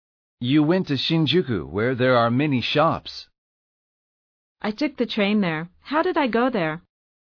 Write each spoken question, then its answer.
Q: How did I go there?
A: You took the train.